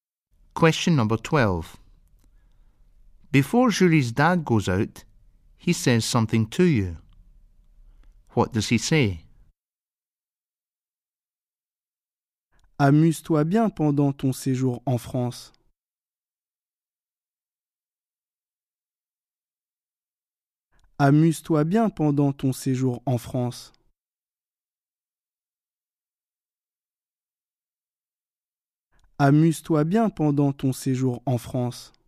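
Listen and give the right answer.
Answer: Enjoy your stay in France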